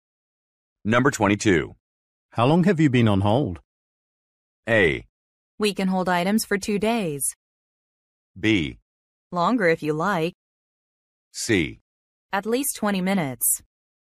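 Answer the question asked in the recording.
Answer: C: At least 20 minutes.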